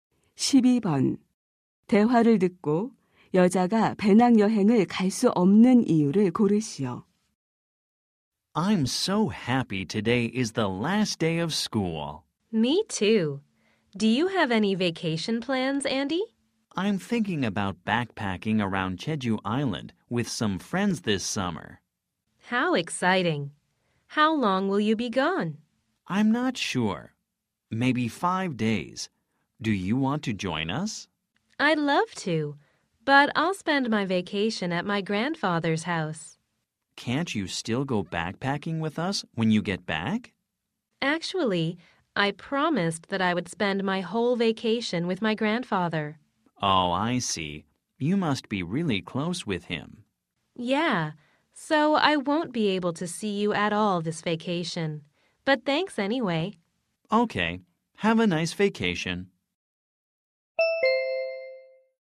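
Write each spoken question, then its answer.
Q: 대화를 듣고 여자가 배낭 여행을 갈 수 없는 이유를 고르시오.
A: 방학 내내 할아버지 댁에서 지내기로 약속해서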